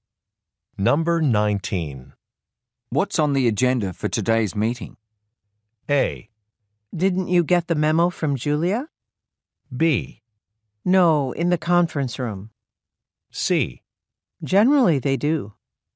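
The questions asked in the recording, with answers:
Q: What's on the agenda for today's meeting?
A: A: Didn't you get the memo from Julia?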